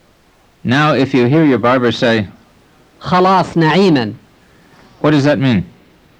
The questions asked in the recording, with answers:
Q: What does that mean?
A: It means I have finished. I wish you God's grace.